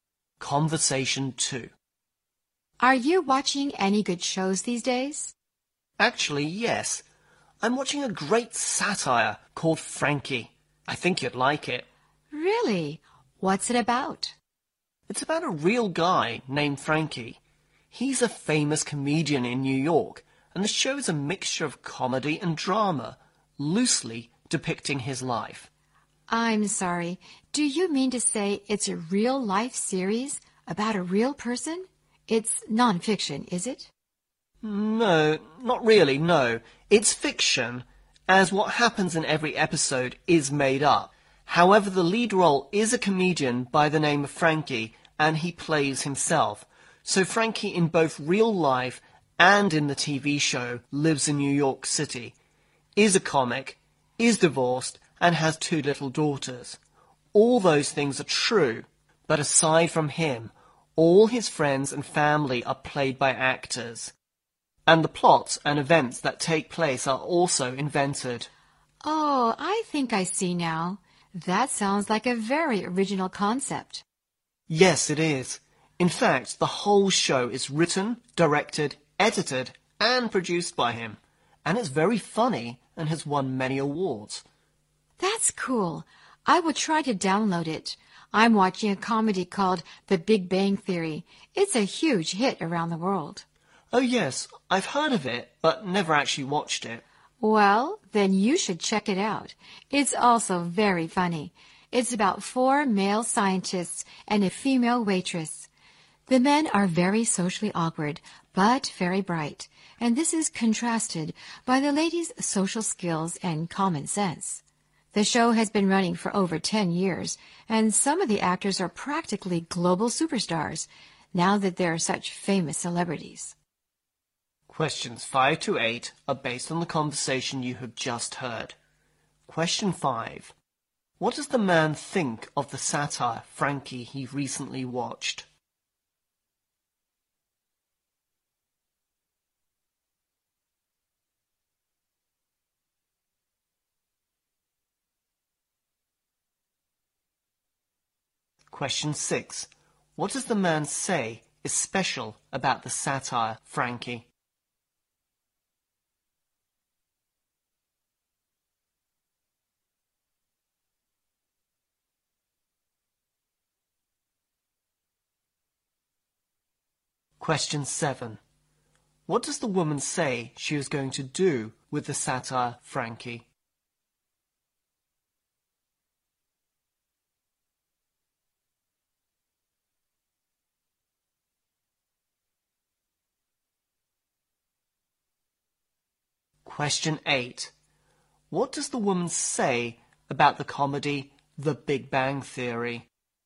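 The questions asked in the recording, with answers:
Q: What does the man think of the satire, Frankie, he recently watched?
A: It is great, very funny and original

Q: What does the man say is special about the satire, Frankie?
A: The comedian plays himself and writes, directs, edits and produces the show

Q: What does the woman say she is going to do with the satire, Frankie?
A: Download it

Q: What does the woman say about the comedy The Big Bang Theory?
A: She has heard of it but never watched it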